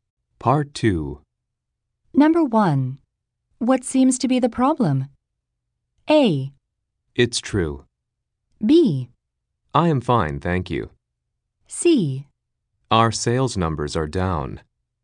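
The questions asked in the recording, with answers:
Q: What seems to be the problem?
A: C: Our sales numbers are down.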